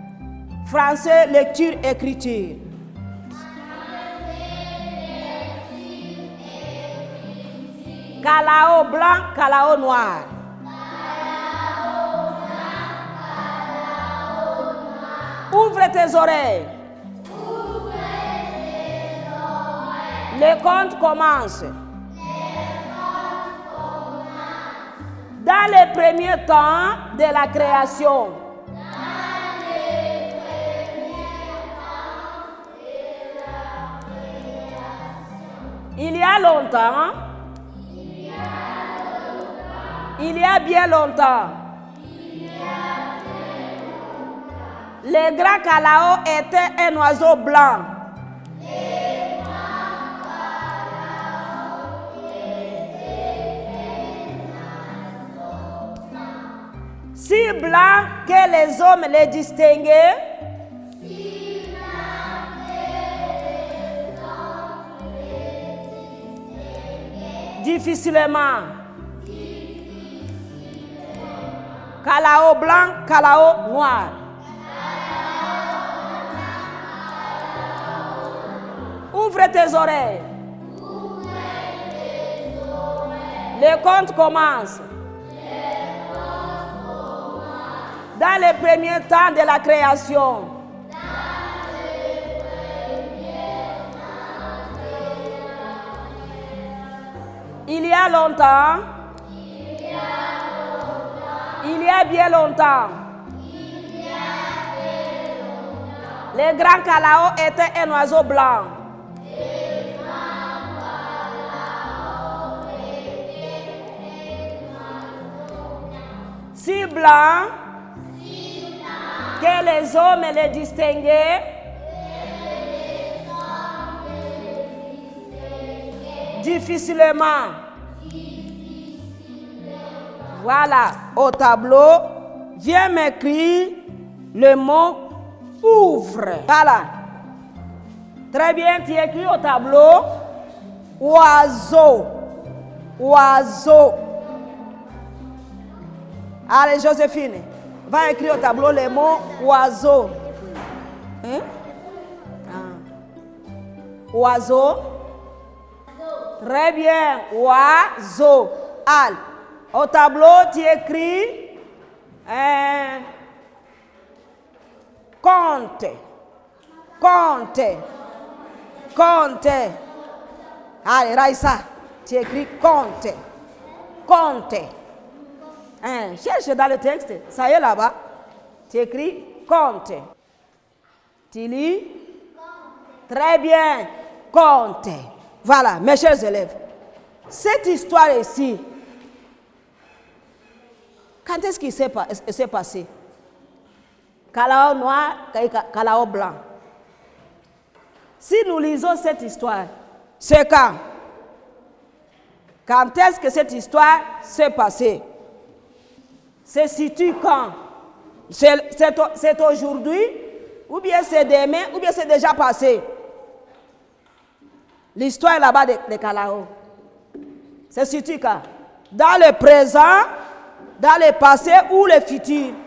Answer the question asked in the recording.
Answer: Le passé, parce que ici, on conjugue les verbes au temps imparfait.